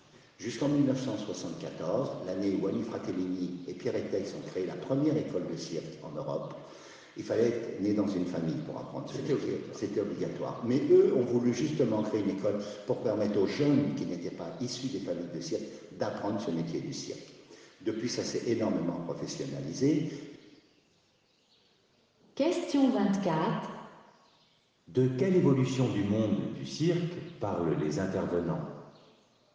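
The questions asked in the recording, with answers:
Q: De quelle évolution du monde du cirque parlent les intervenants ?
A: Depuis 1974, on peut apprendre le métier du cirque dans une école sans être né dans une famille du cirque ; le métier s'est professionnalisé.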